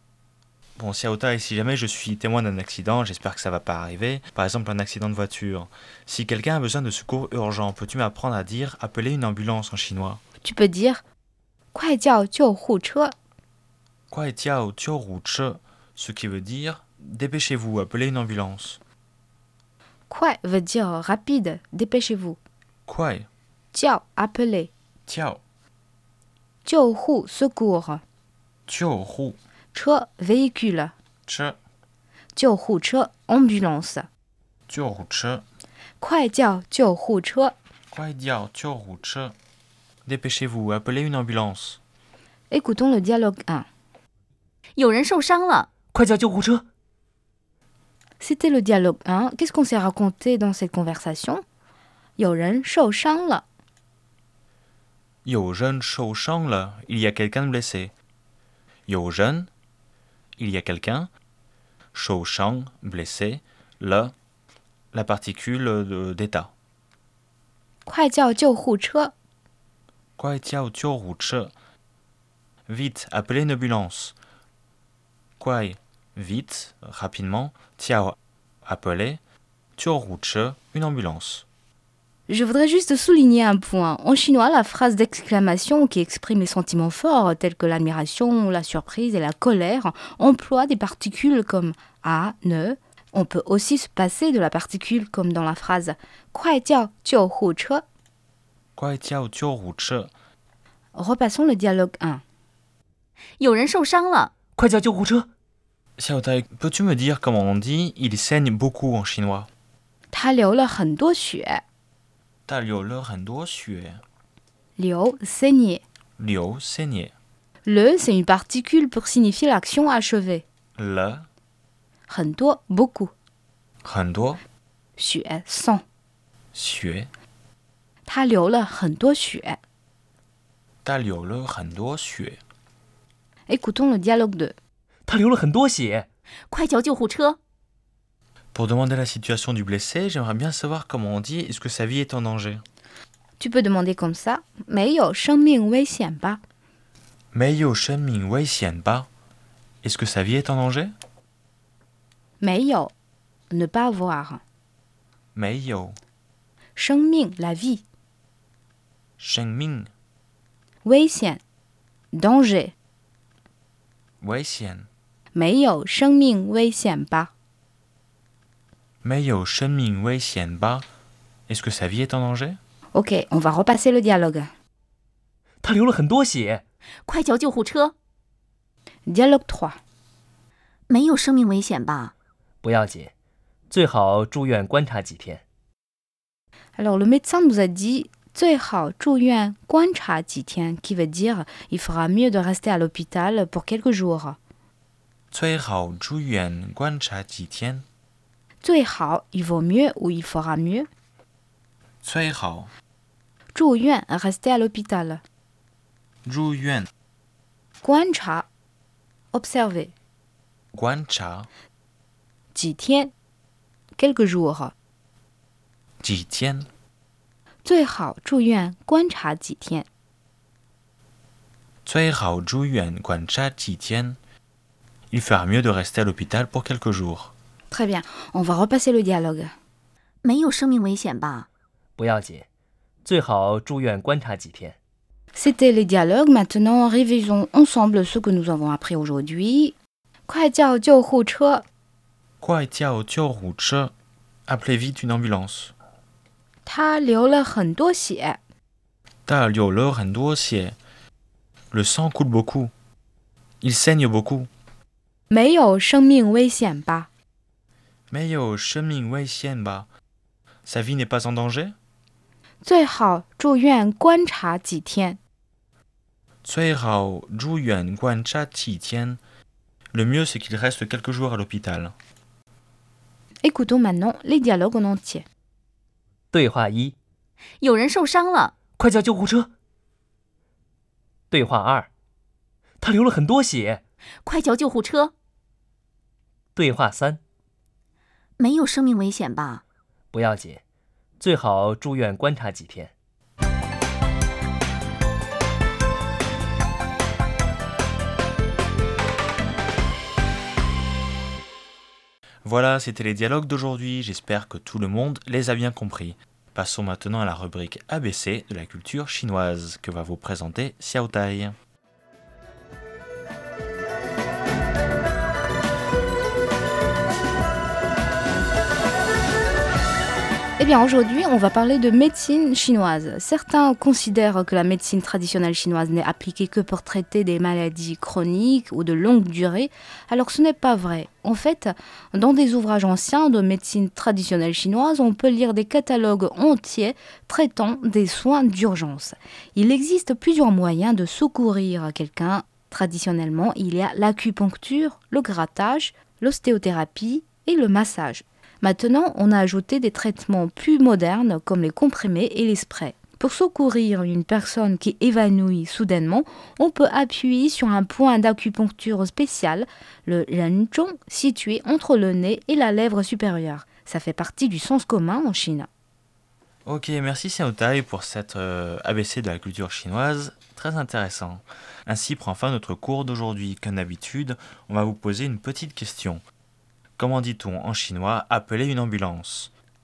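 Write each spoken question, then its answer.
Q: Comment dit-on en chinois « appeler une ambulance » ?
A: 快叫救护车 (kuai jiao jiu hu che)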